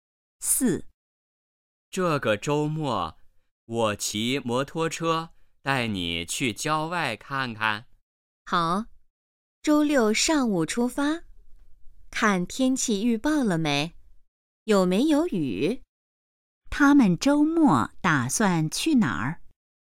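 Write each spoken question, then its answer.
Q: 他们周末打算去哪儿?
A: 郊外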